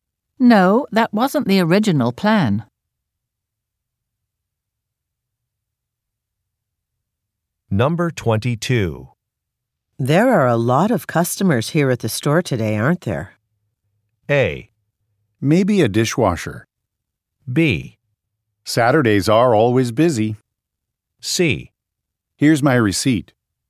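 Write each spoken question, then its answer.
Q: There are a lot of customers here at the store today, aren't there?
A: B: Saturdays are always busy.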